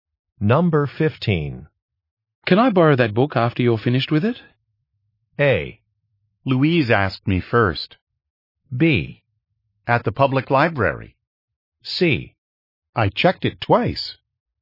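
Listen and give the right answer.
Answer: A: Louise asked me first.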